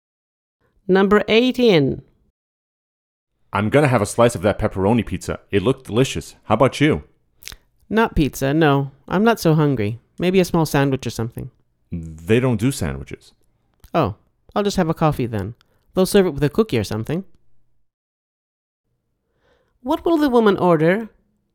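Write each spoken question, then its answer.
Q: What will the woman order?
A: A coffee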